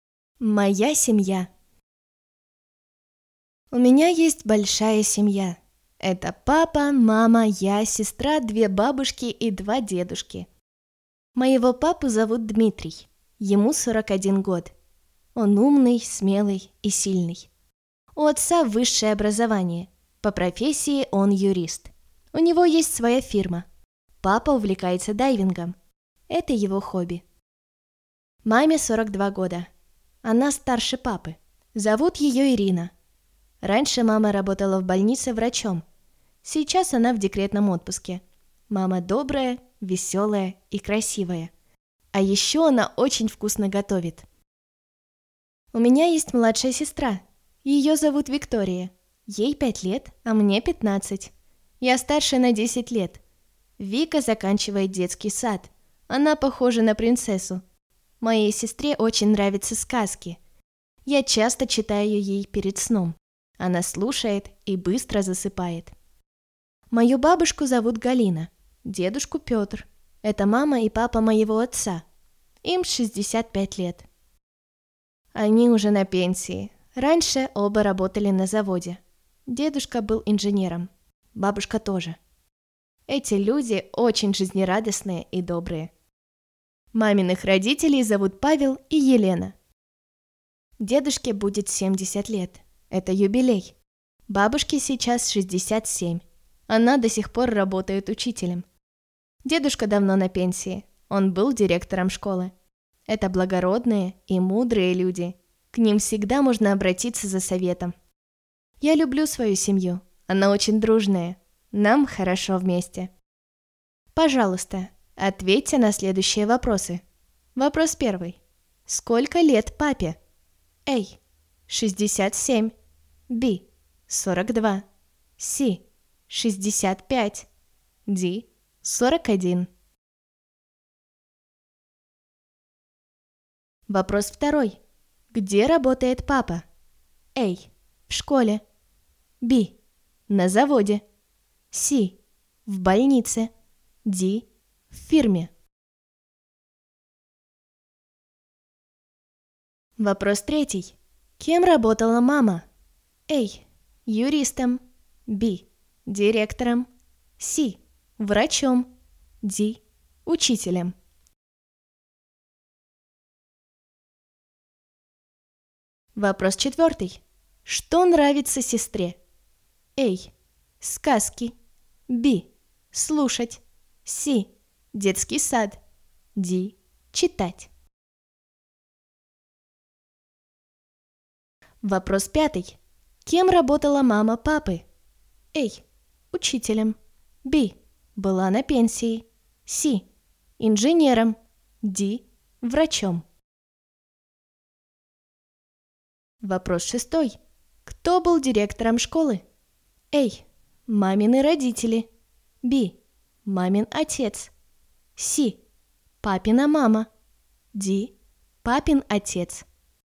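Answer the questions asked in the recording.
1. D: 41.
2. D: В фирме.
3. C: Врачом.
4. A: Сказки.
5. C: Инженером.
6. B: Мамин отец.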